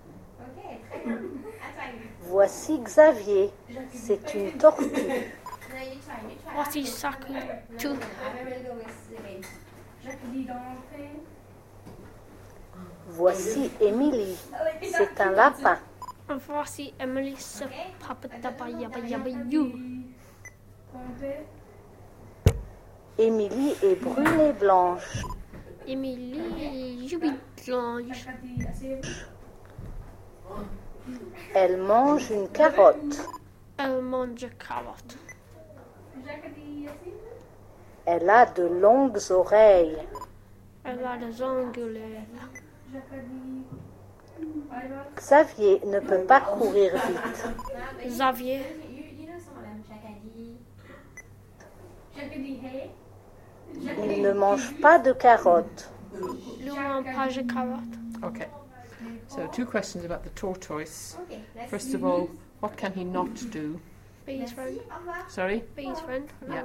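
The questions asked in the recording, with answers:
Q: what can he not do?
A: Run fast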